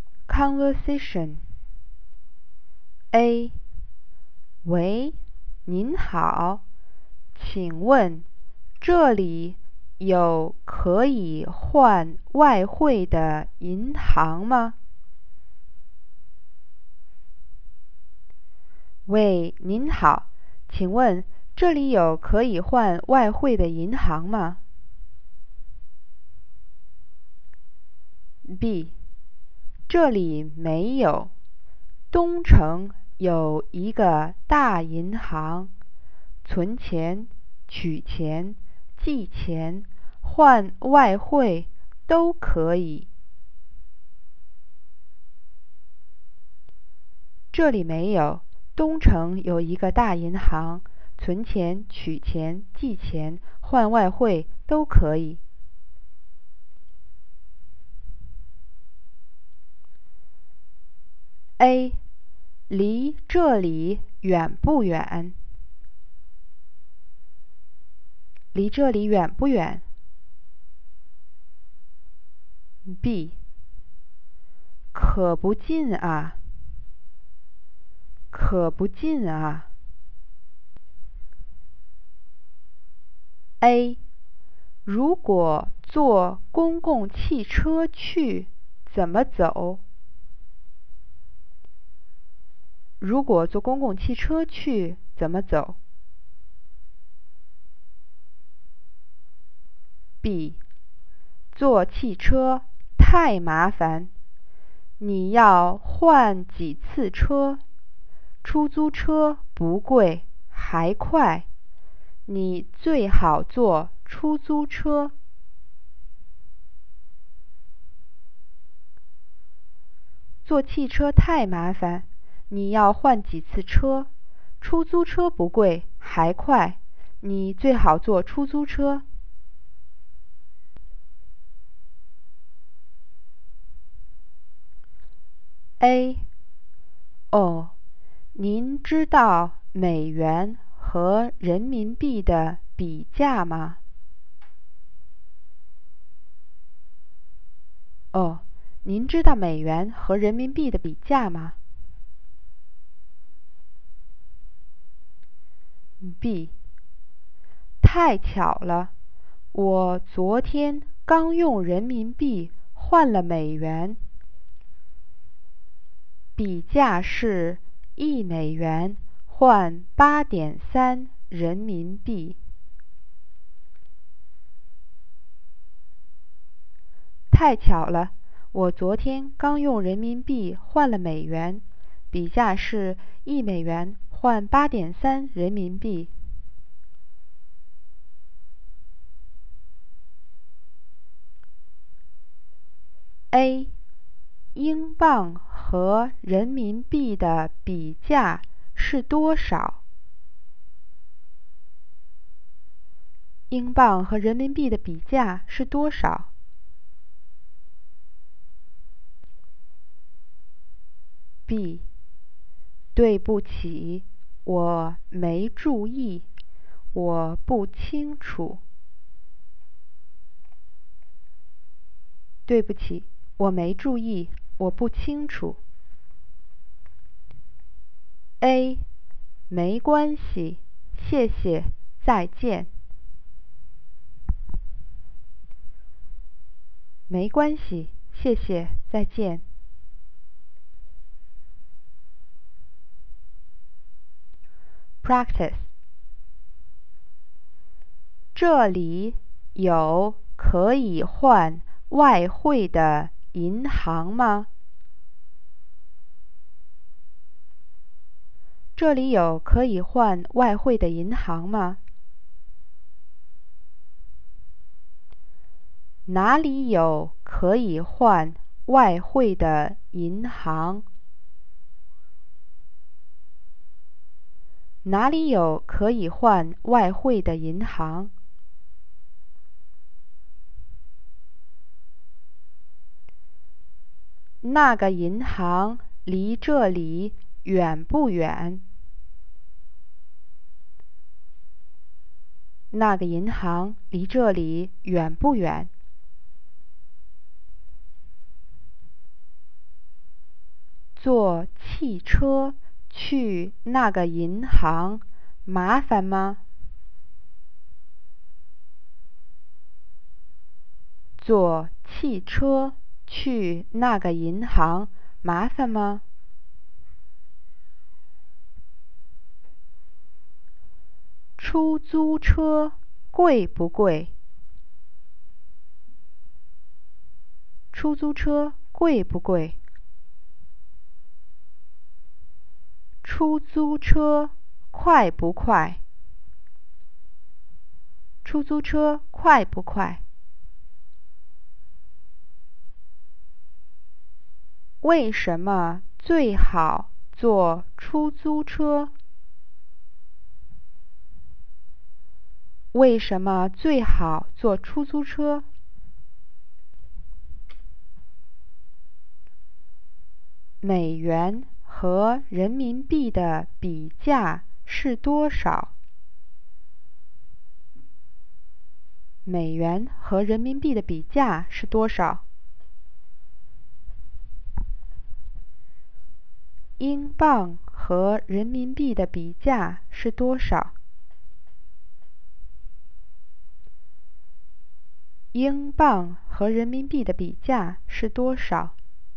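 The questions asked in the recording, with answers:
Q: 这里有可以换外汇的银行吗?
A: 没有

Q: 哪里有可以换外汇的银行?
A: 东城

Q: 那个银行离这里远不远?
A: 远(可不近)

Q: 坐汽车去那个银行麻烦吗?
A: 麻烦,要换几次车

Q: 出租车贵不贵?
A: 不贵

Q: 为什么最好坐出租车?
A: 出租车不贵,还快

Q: 美元和人民币的比价是多少?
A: 一美元换8.3人民币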